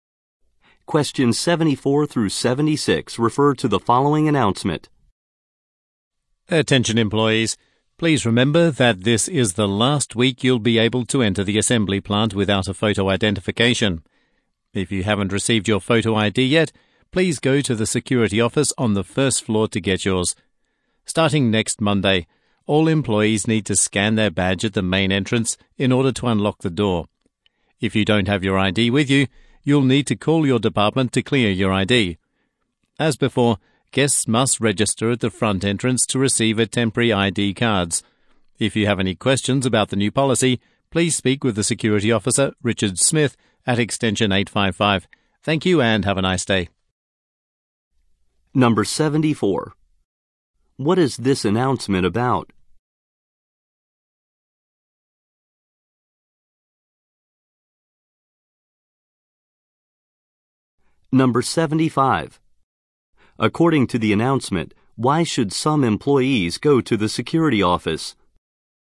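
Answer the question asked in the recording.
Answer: A new photo ID entry policy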